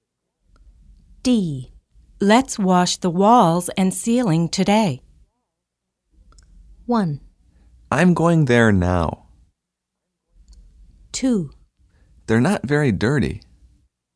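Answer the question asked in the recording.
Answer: 2: They're not very dirty.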